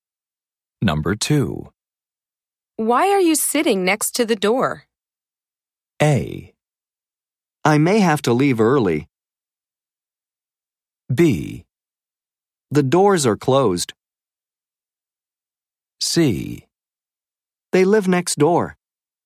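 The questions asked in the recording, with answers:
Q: Why are you sitting next to the door?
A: A: I may have to leave early.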